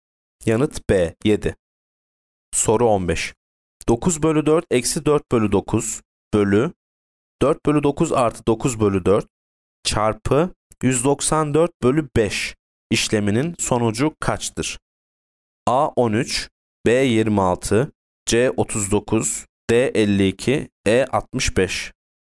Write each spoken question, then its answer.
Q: 9 bölü 4 eksi 4 bölü 9 bölü 4 bölü 9 artı 9 bölü 4 çarpı 194 bölü 5 işleminin sonucu kaçtır?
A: Yanıt B 26.